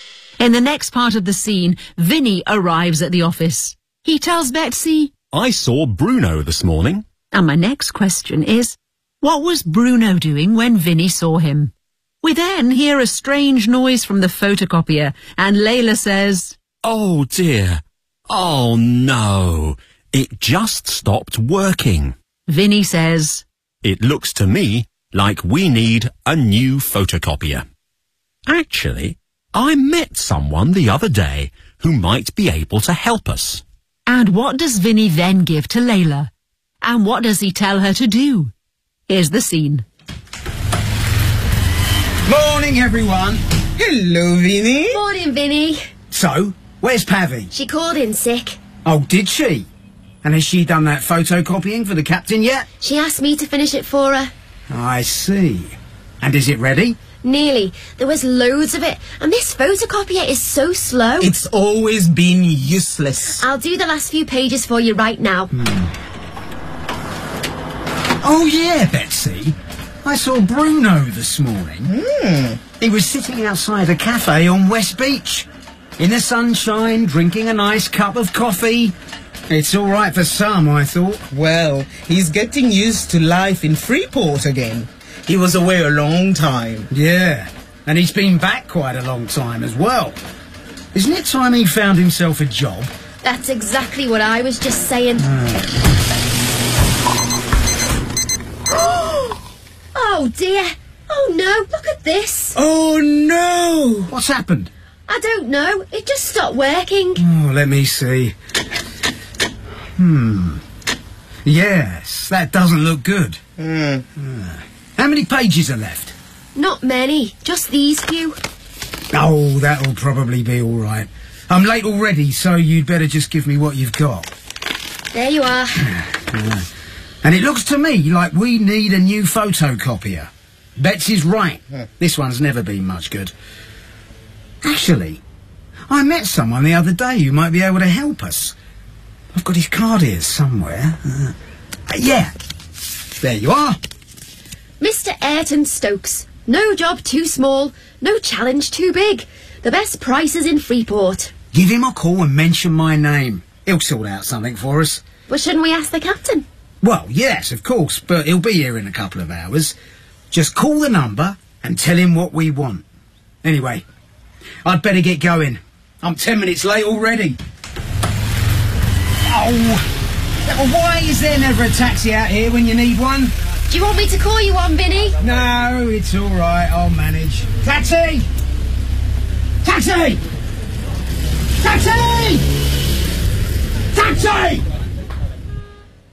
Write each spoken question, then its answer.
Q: what was Bruno doing when Vinny saw him?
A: He was sitting outside a cafe on West Beach, in the sunshine, drinking a nice cup of coffee.

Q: And what does Vinny then give to Layla?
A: A business card.

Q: And what does he tell her to do?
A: Give him a call and mention my name.